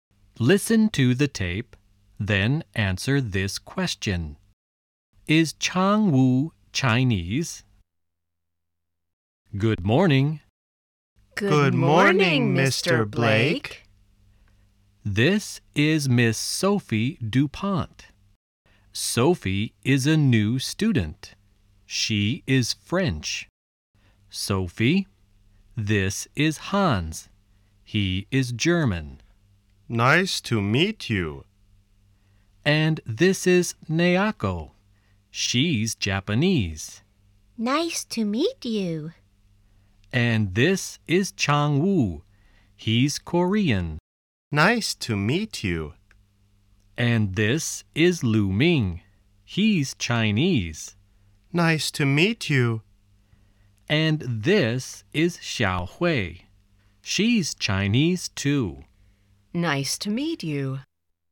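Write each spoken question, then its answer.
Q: Is Chang Wu Chinese?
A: No, he isn't. He's Korean.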